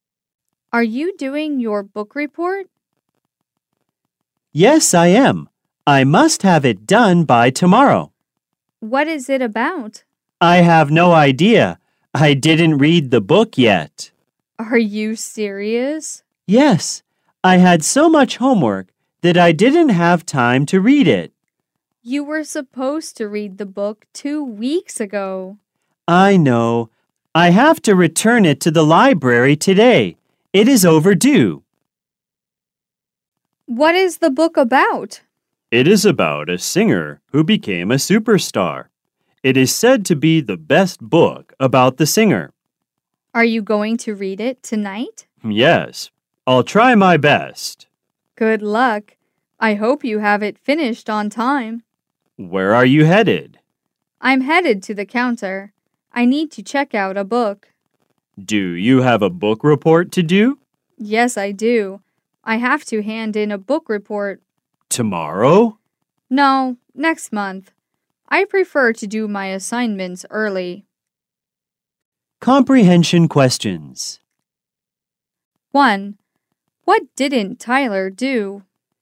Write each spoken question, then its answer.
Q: What didn't Tyler do?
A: He didn't read the book for his book report.